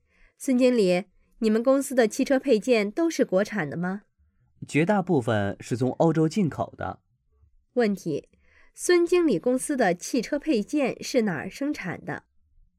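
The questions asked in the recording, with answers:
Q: 孙经理公司的汽车配件是哪儿生产的?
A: 绝大部分是从欧洲进口的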